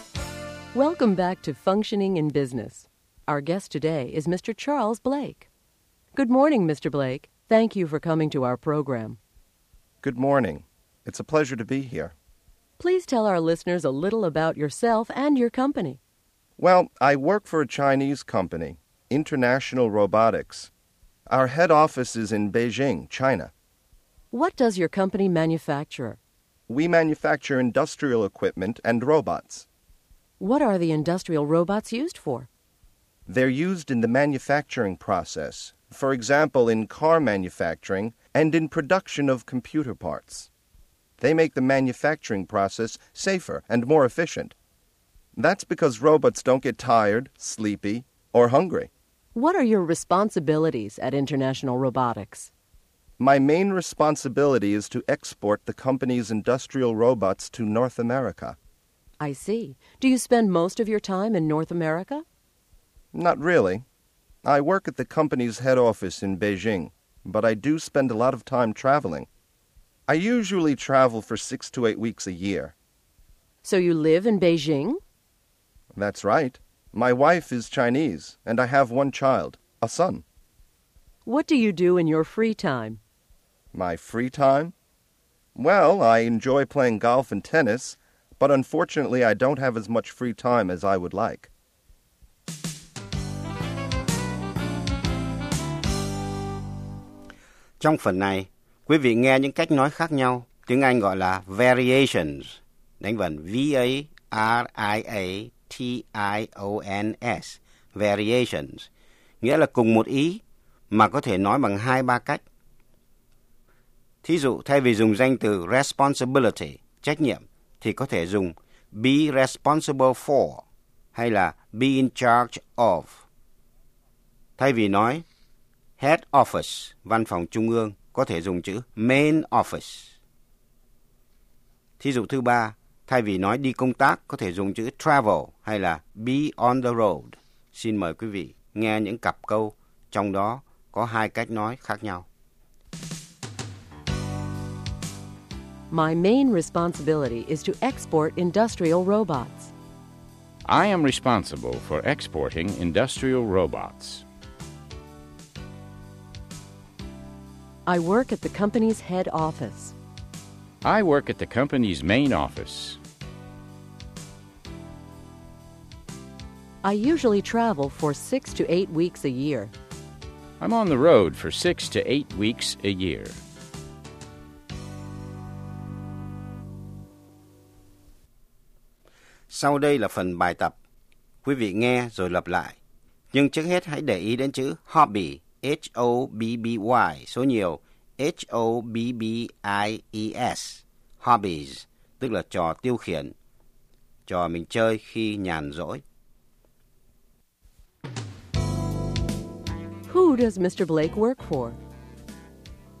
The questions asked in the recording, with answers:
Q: Who does Mr. Blake work for?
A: He works for International Robotics, a Chinese company.